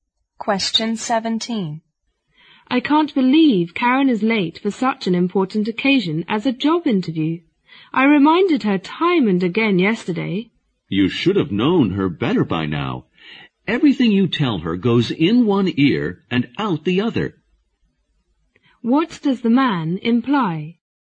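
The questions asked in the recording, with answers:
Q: What does the man imply?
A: Karen is forgetful and never listens to reminders, so her lateness is no surprise.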